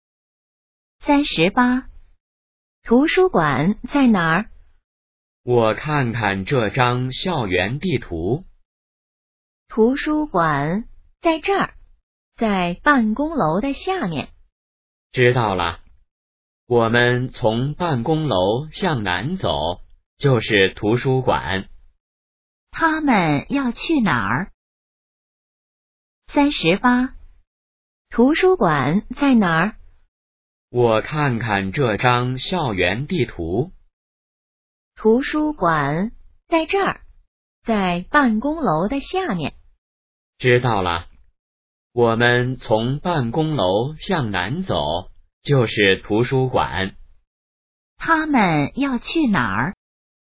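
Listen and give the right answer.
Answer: 图书馆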